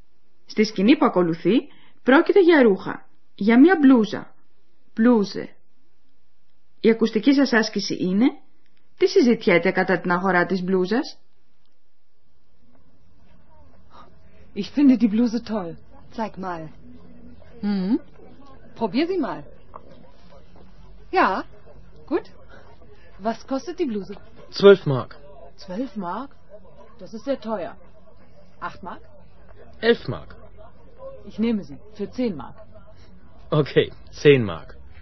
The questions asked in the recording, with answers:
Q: Τι συζητιέται κατά την αγορά της μπλούζας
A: Ο πελάτης παζαρεύει την τιμή.